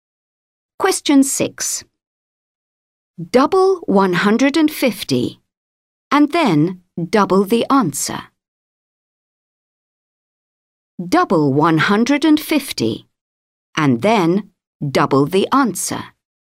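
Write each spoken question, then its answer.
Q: Double 150 and then double the answer.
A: 600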